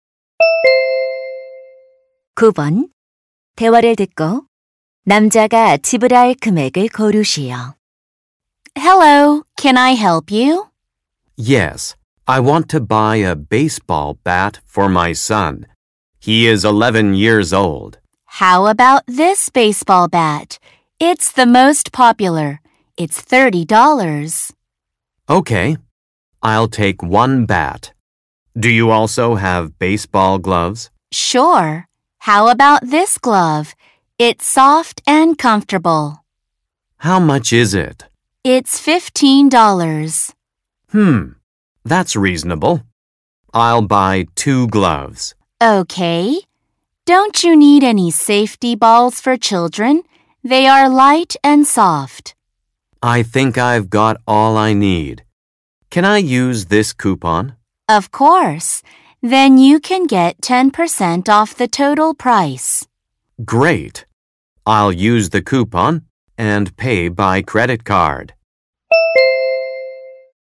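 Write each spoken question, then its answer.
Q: 대화를 듣고 남자가 지불할 금액을 고르시오.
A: $54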